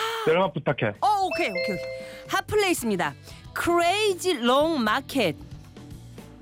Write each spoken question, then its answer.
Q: Hot place입니다. Crazy long market.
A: 신 광장 시장.